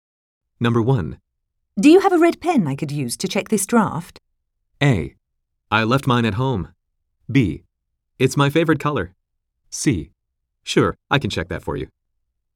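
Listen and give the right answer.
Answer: A: I left mine at home.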